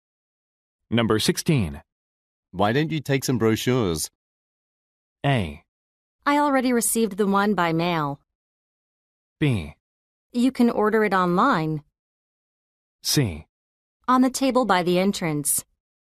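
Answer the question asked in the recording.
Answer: A: I already received the one by mail.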